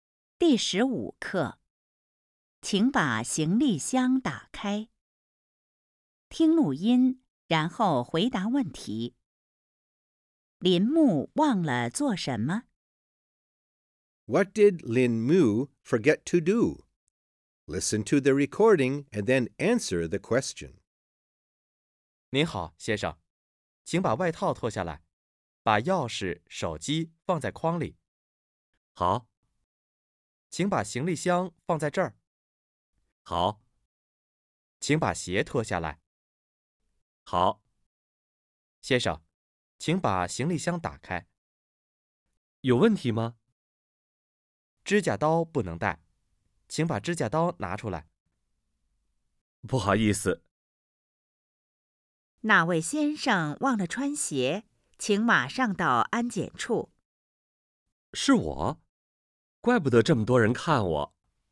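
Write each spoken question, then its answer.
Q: 林木忘了做什么?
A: 忘了穿鞋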